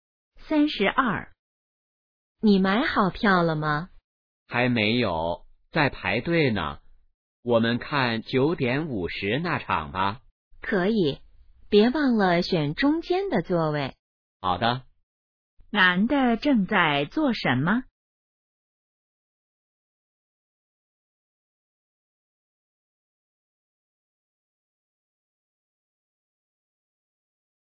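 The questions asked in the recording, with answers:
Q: 男的正在做什么?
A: 排队买票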